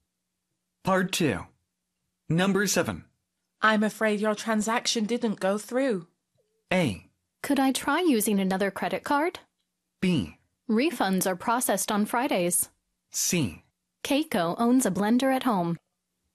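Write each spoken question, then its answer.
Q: I'm afraid your transaction didn't go through.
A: A: Could I try using another credit card?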